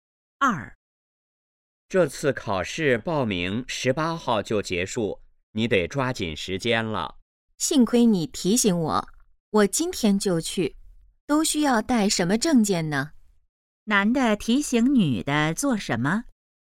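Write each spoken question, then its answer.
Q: 男的提醒女的做什么?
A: 抓紧时间报名考试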